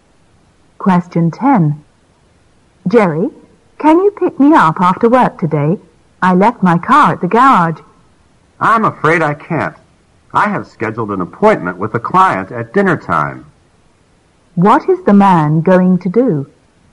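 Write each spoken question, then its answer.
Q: What is the man going to do?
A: Meet a client at dinner time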